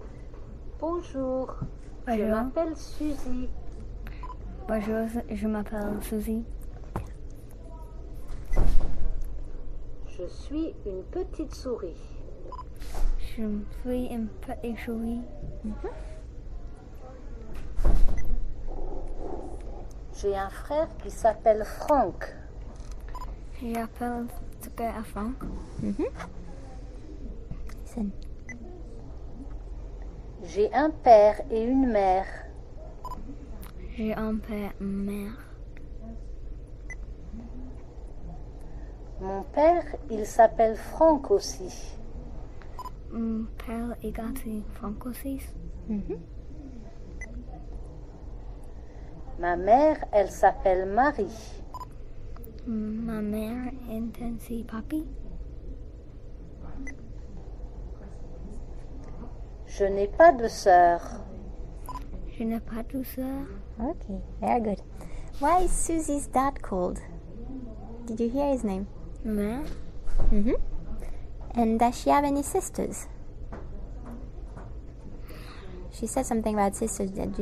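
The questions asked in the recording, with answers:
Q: Why is Susie's dad called?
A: Franck

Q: And does she have any sisters?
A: No, she has no sisters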